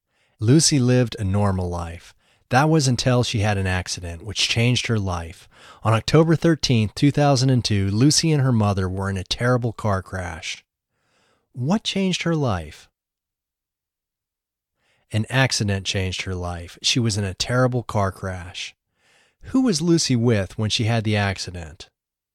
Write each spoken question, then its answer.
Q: Who was Lucy with when she had the accident?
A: She was with her mother.